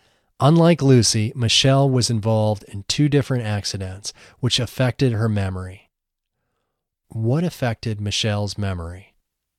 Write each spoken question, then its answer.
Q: What affected Michelle's memory?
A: Two different accidents affected her memory.